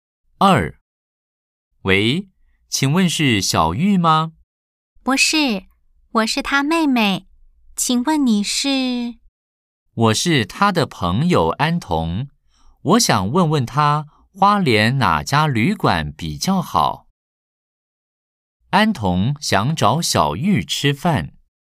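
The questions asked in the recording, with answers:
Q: 安童想找小玉吃饭。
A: 错 (X):安童想问花莲哪家旅馆比较好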